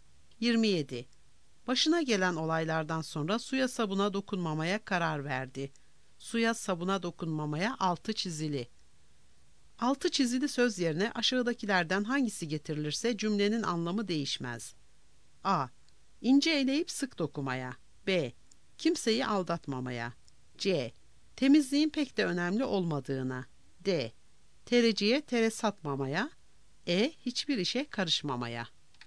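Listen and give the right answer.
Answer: E: Hiçbir işe karışmamaya.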